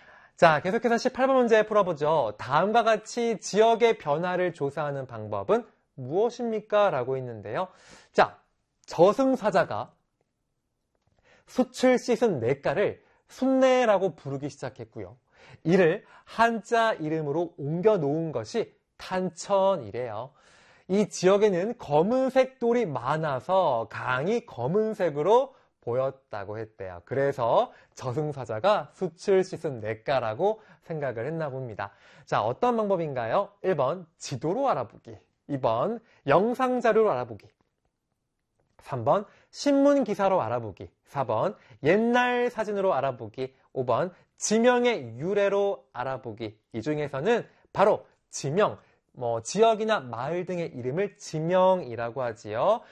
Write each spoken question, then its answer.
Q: 다음과 같이 지역의 변화를 조사하는 방법은 무엇입니까?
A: 18번 문제 5번이 정답이다